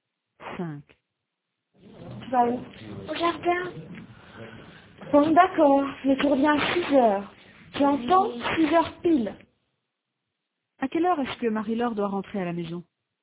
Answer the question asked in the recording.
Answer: À 6h. 6h pile.